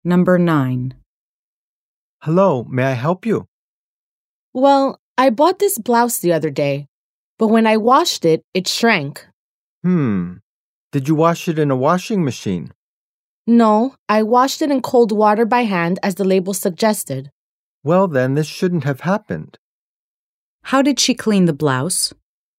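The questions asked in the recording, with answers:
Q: How did she clean the blouse?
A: She washed it by hand in cold water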